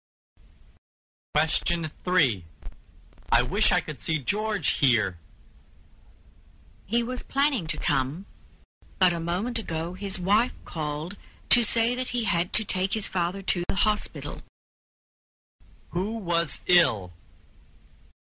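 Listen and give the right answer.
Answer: George's father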